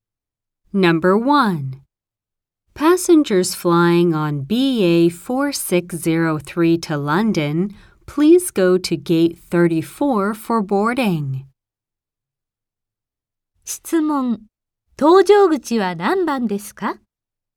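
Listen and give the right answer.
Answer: 34番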